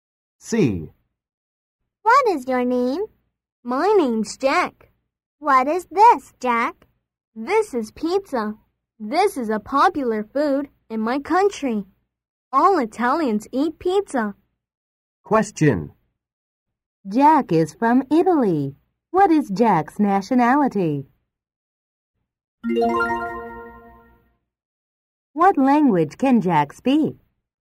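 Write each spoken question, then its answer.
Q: Jack is from Italy. What is Jack's nationality?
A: Italian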